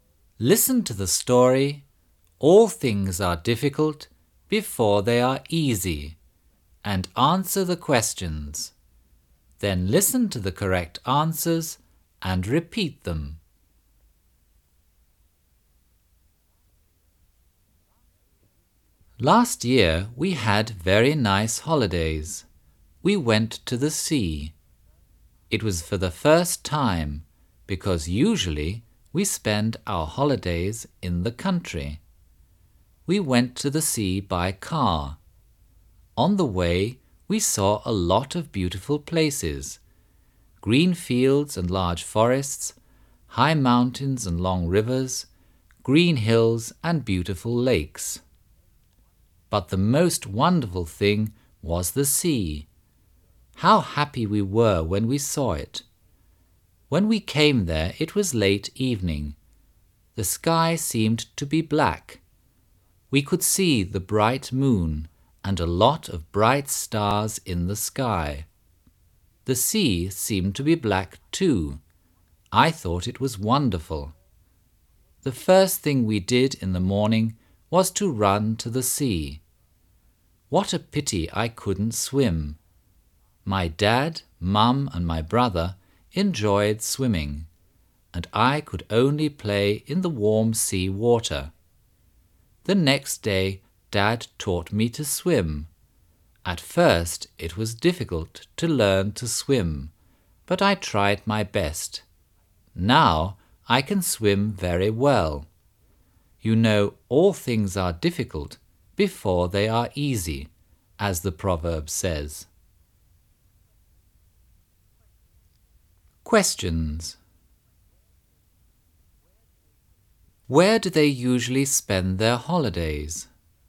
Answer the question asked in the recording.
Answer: They usually spend their holidays in the country.